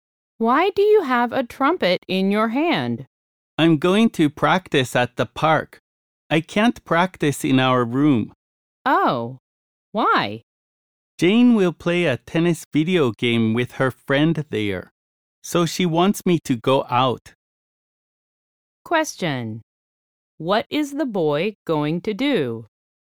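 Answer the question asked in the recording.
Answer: Practice the trumpet at the park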